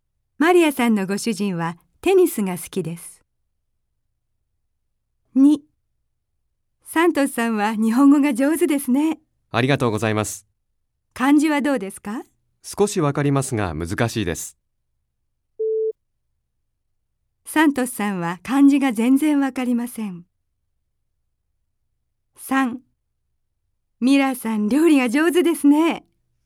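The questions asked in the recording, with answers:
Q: サントスさんは漢字が全然わかりません。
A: ×(少しわかります)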